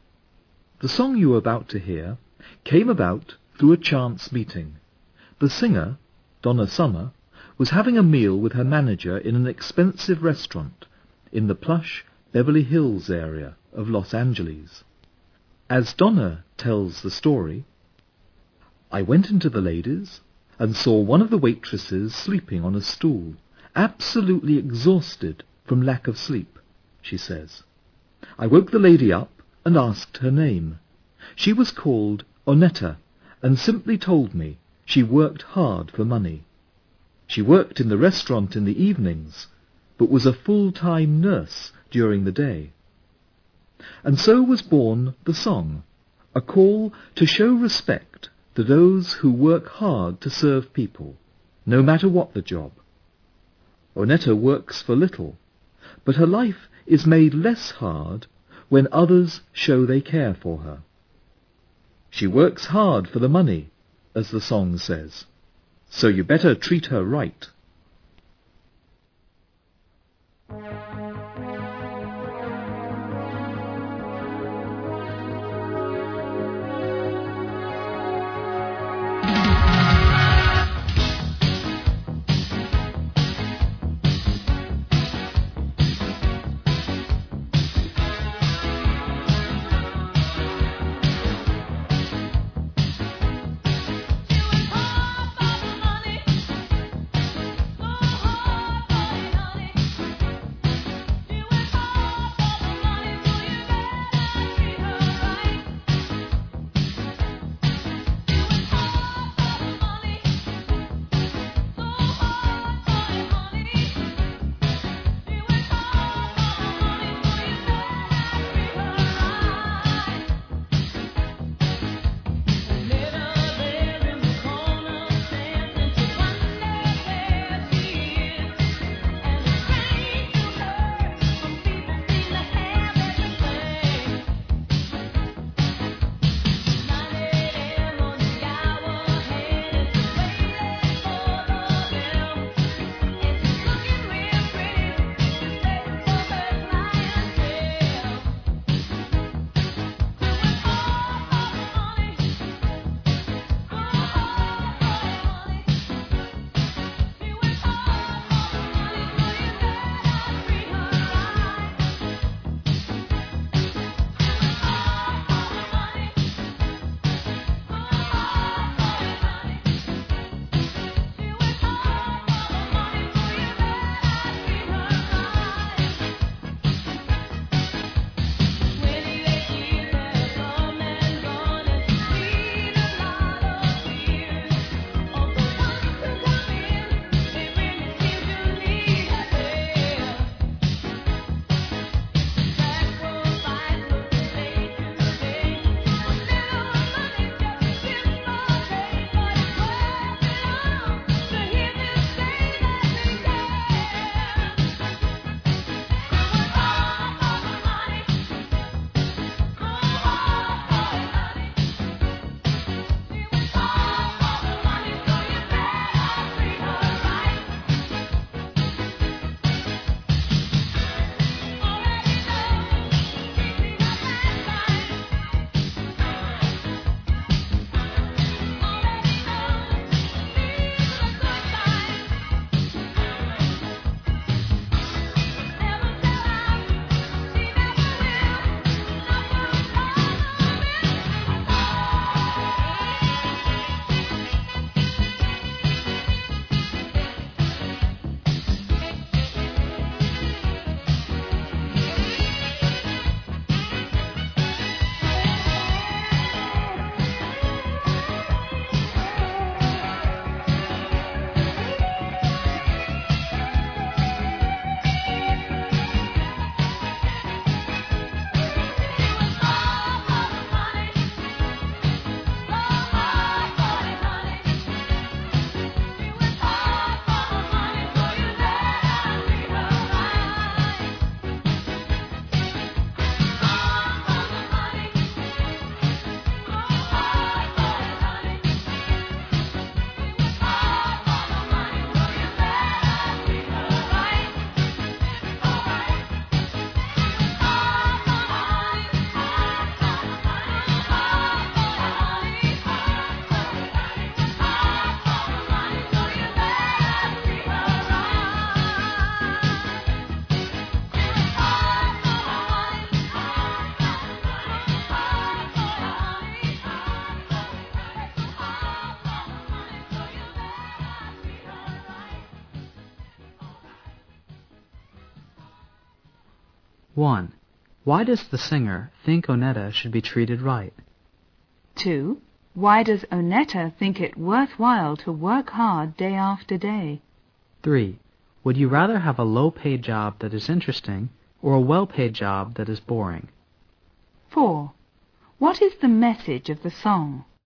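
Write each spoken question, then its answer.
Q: Why does the singer think Onetta should be treated right?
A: Because she works hard for the money to serve people

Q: What is the message of the song?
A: Respect those who work hard to serve people, no matter what the job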